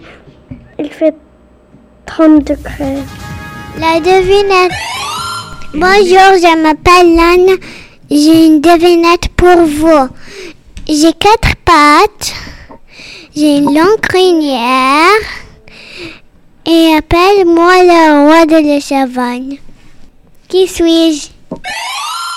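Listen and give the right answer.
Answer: le lion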